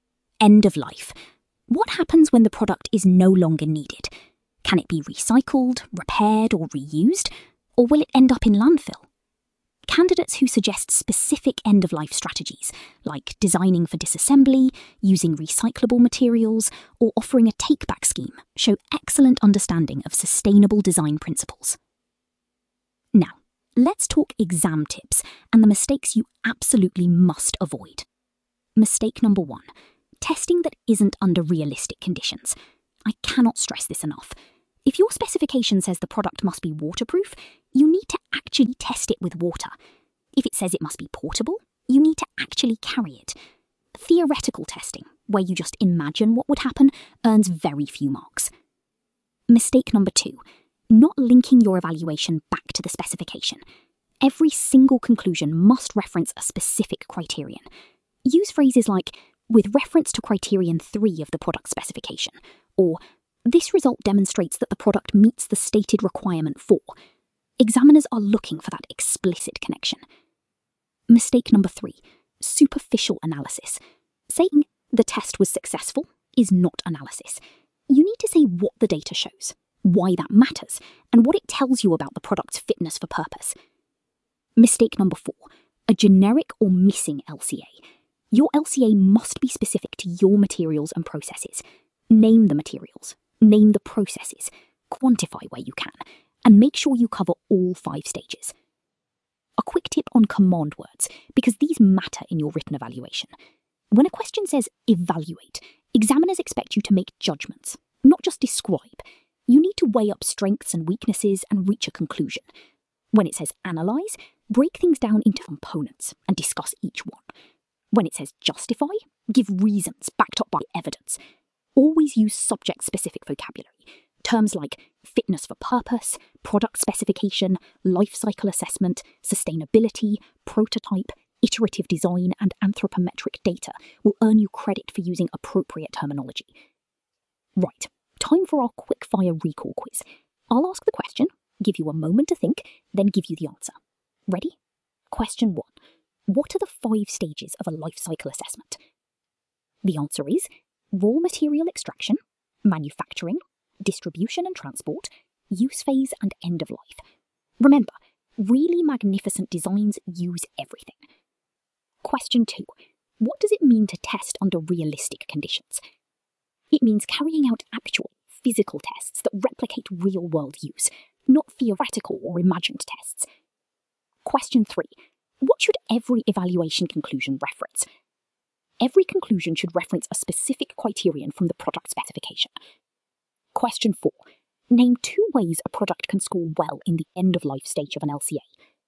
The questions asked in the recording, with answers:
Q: Name two ways a product can score well in the end-of-life stage of an LCA.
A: Good answers include using recyclable materials, designing for disassembly, offering a repair service, using biodegradable materials, or implementing a take-back scheme.